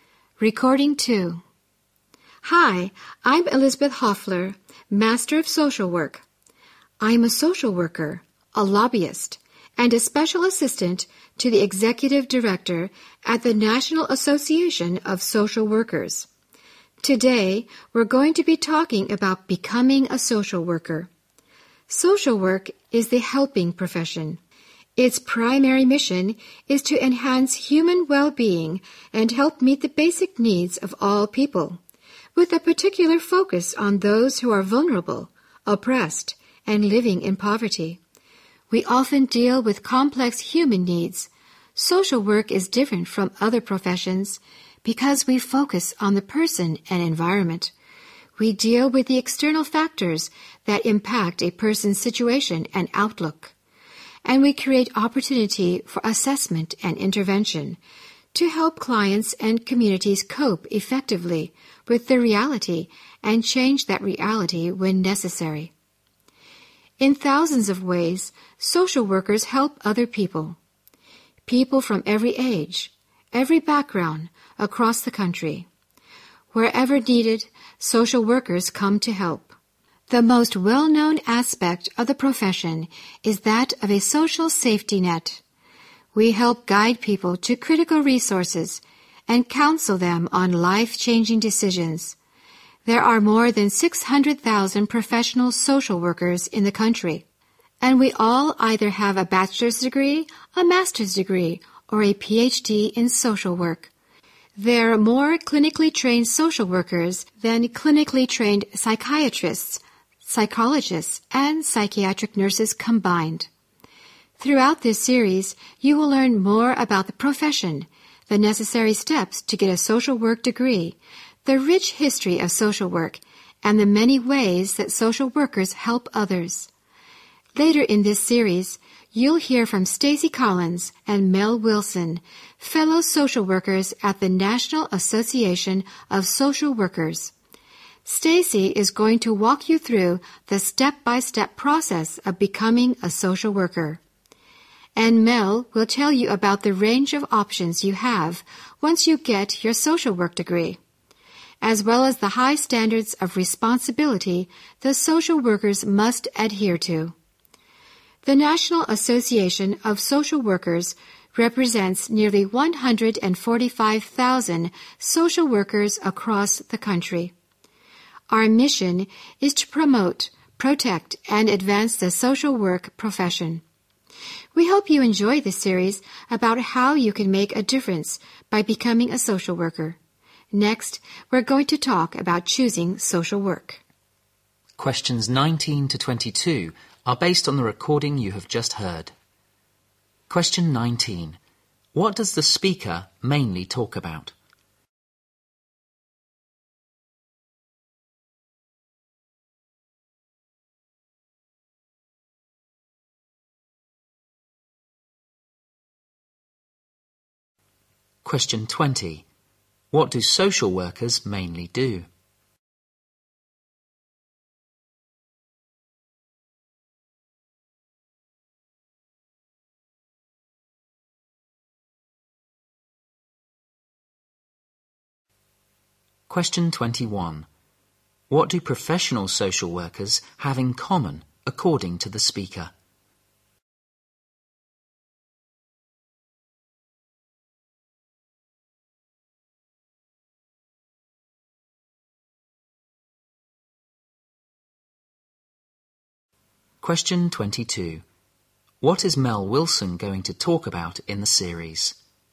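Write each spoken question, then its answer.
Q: What does the speaker mainly talk about?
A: Becoming a social worker.

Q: What do social workers mainly do?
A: Help people, especially the vulnerable, meet their basic needs.

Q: What do professional social workers have in common according to the speaker?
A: They all have a degree in social work.

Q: What is Mel Wilson going to talk about in the series?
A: Career options with a social work degree and the high standards of responsibility.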